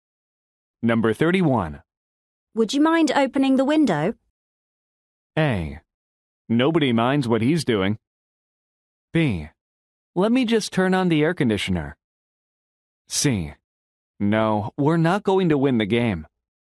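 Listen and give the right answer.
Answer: B: Let me just turn on the air conditioner.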